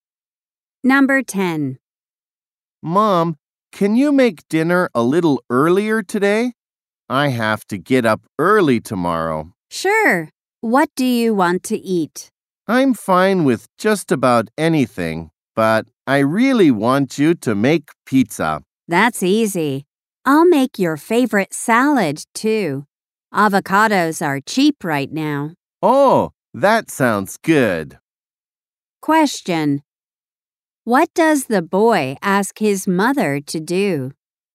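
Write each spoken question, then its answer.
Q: What does the boy ask his mother to do?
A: Make dinner a little earlier.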